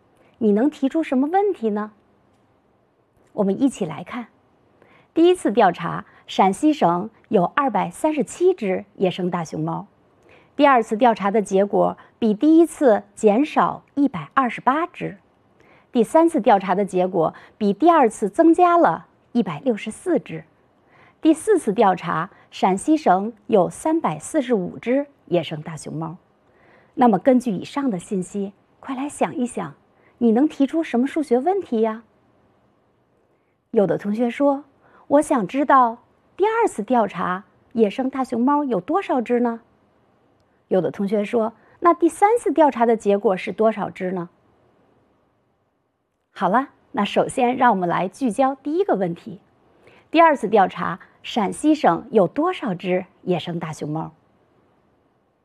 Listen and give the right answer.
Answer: 所以第二次调查有109只野生大熊猫